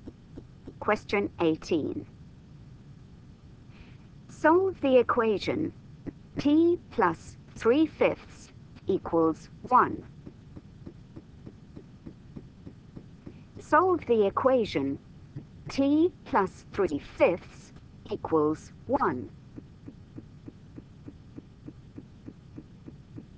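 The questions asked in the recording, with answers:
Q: Solve the equation T plus 3/5 equals 1.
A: 2/5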